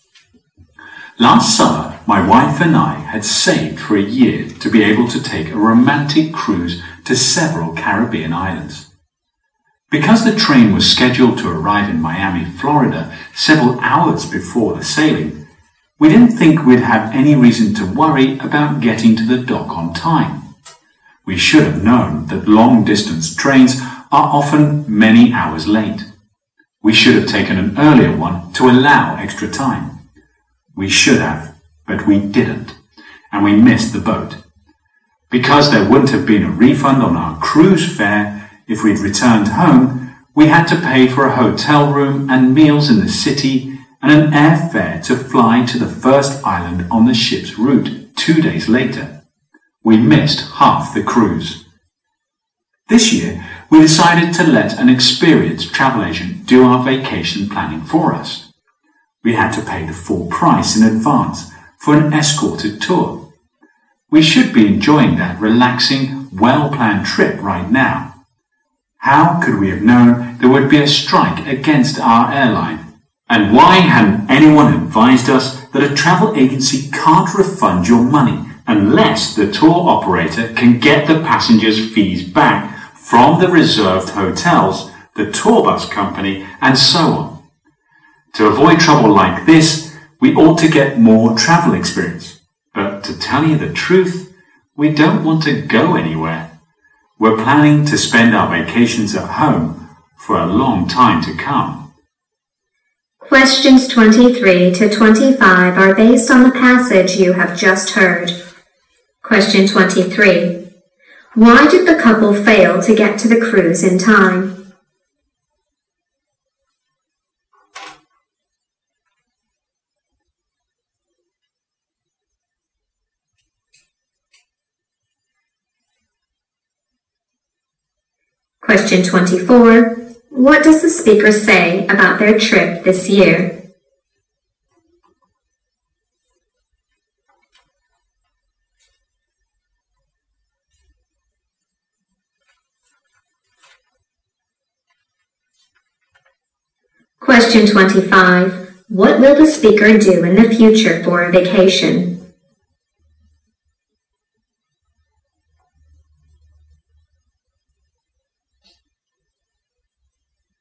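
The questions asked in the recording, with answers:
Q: Why did the couple fail to get to the cruise in time?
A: Their train was late.

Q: What does the speaker say about their trip this year?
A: An airline strike ruined it, and they could not get their money back.

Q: What will the speaker do in the future for a vacation?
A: Stay at home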